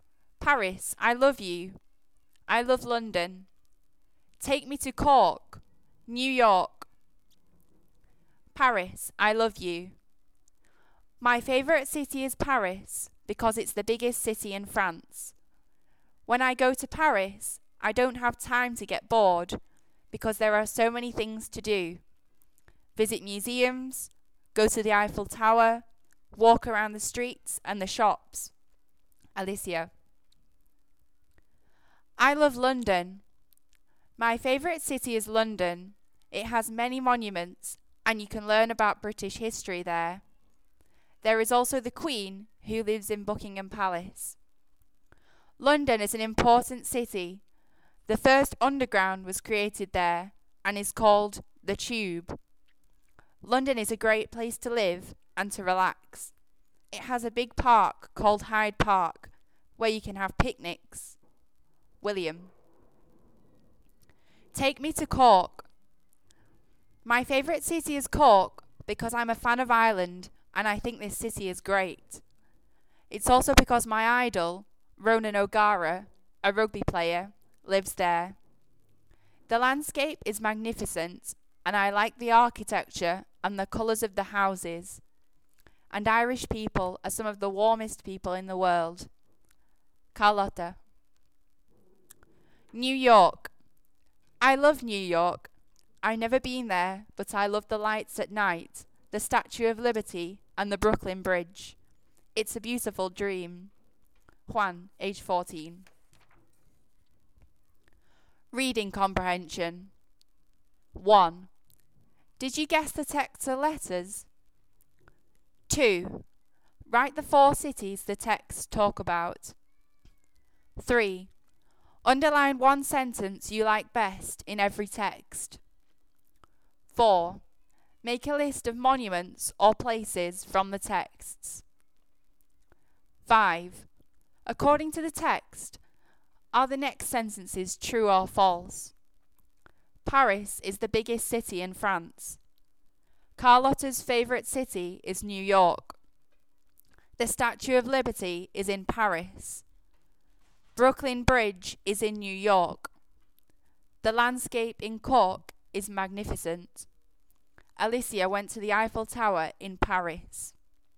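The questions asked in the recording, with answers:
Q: Write the four cities the texts talk about.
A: Paris, London, Cork, New York

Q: Paris is the biggest city in France.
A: True

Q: The Statue of Liberty is in Paris.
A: False

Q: Brooklyn Bridge is in New York.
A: True

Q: The landscape in Cork is magnificent.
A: True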